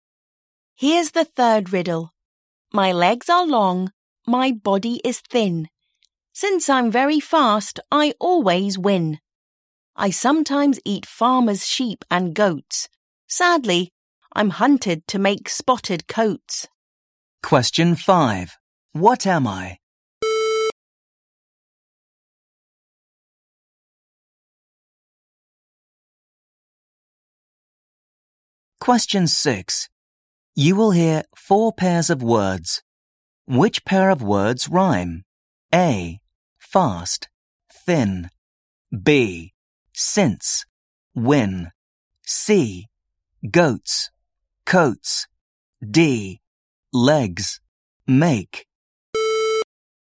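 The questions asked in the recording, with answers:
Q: Which pair of words rhyme?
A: C: Goats, coats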